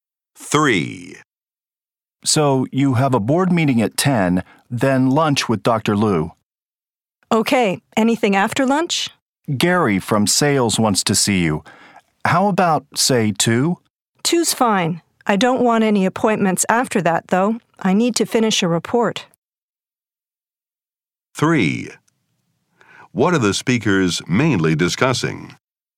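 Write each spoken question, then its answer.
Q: What are the speakers mainly discussing?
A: A daily schedule of appointments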